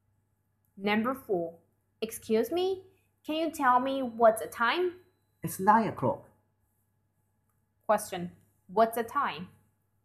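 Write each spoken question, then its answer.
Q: What's the time?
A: It's 9 o'clock.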